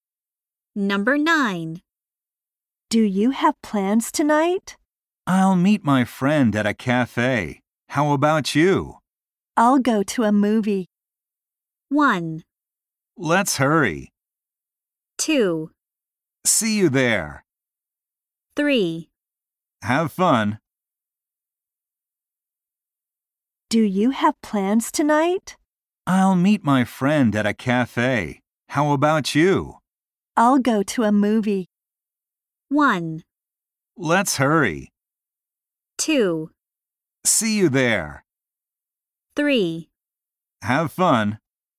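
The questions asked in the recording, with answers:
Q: I'll go to a movie.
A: 3: Have fun.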